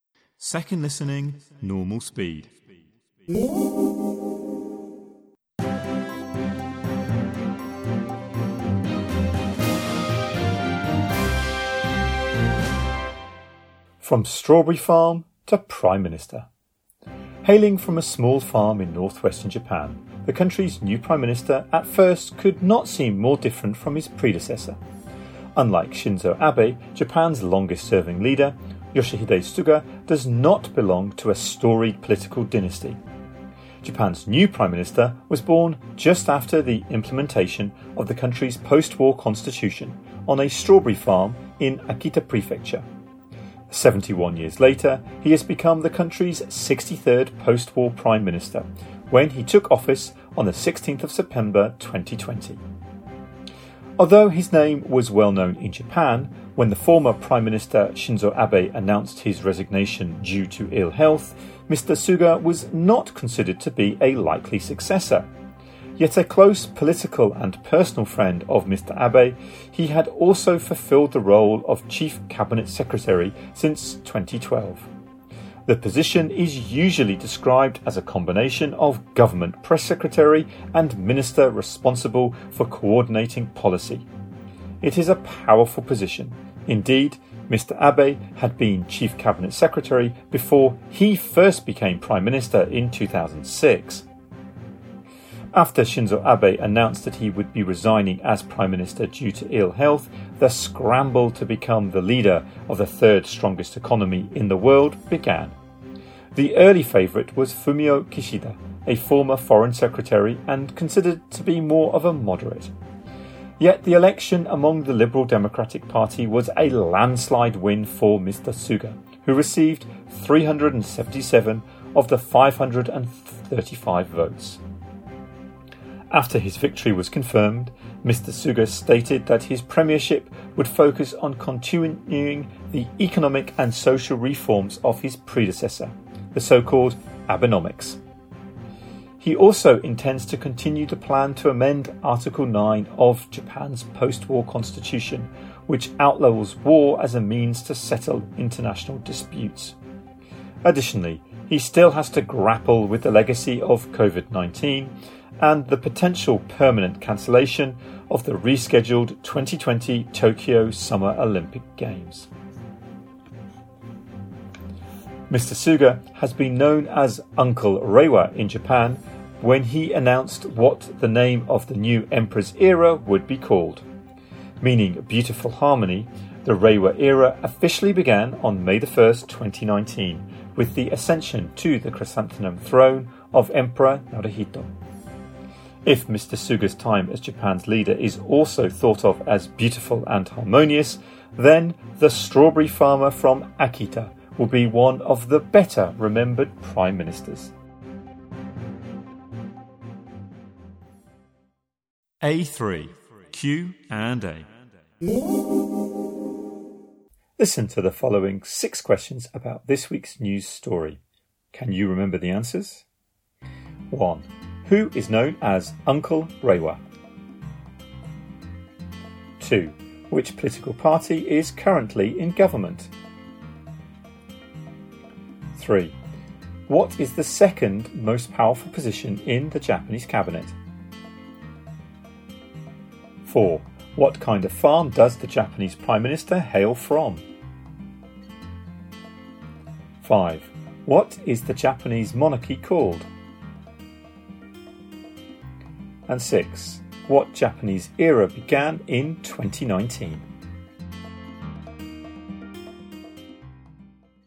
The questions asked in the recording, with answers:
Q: Who is known as Uncle Reiwa?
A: 1. Yoshihide Suga.

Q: Which political party is currently in government?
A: 2. The Liberal Democratic Party.

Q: What is the second most powerful position in the Japanese cabinet?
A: 3. The Chief Cabinet Secretary.

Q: What kind of farm does the Japanese Prime Minister hail from?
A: 4. A Strawberry Farm.

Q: What is the Japanese monarchy called?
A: 5. The Chrysanthemum Throne.

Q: What Japanese era began in 2019?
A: 6. The Reiwa Era.